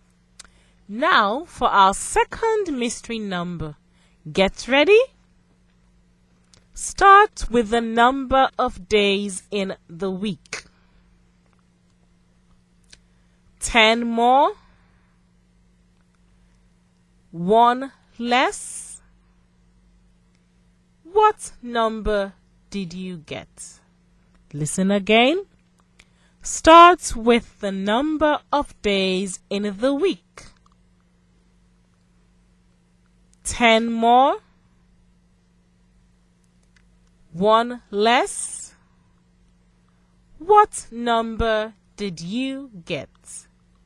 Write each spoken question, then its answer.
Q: What number did you get?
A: I think the mystery number is 16.